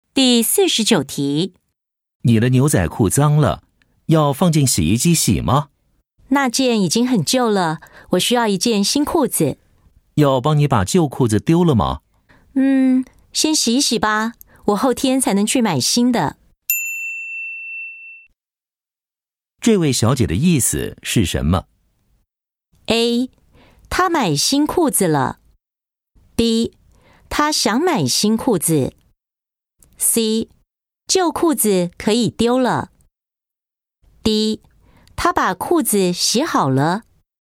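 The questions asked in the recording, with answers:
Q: 这位小姐的意思是什么?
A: B: 她想买新裤子。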